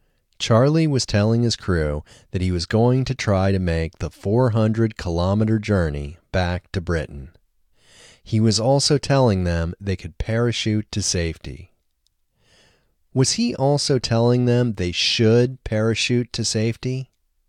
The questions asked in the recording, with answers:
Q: Was he also telling them they should parachute to safety?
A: No, he wasn't telling them they should parachute to safety.